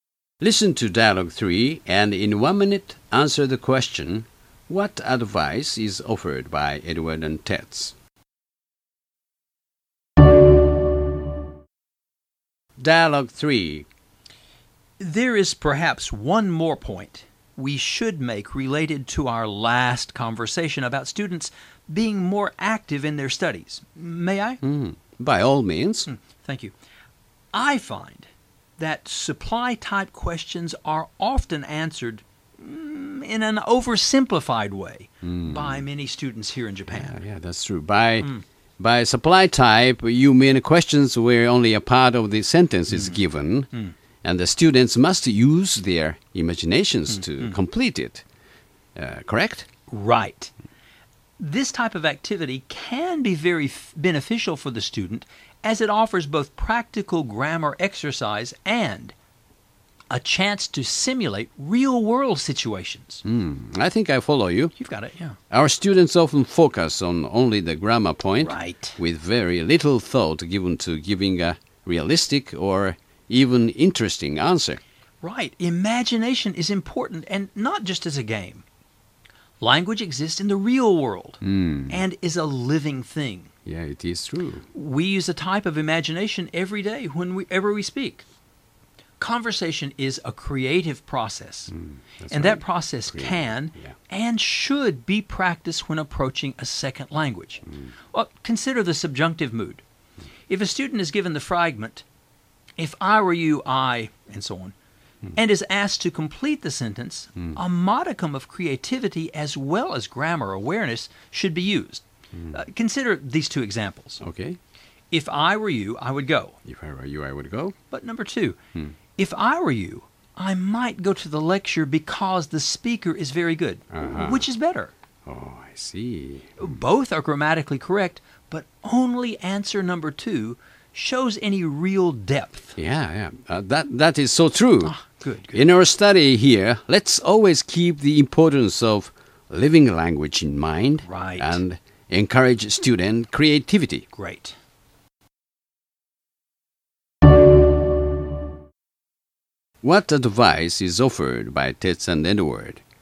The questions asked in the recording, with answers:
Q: What advice is offered by Tets and Edward?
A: One has to use his or her imaginative power when they learn new expressions, vocabulary, or sentence patterns.